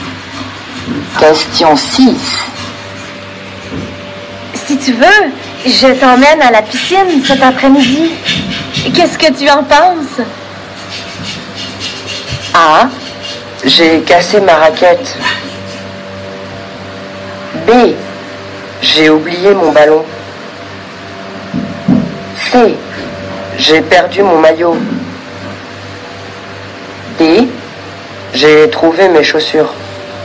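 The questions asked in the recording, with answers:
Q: Si tu veux, je t'emmène à la piscine cet après-midi. Qu'est-ce que tu en penses?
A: C: J'ai perdu mon maillot.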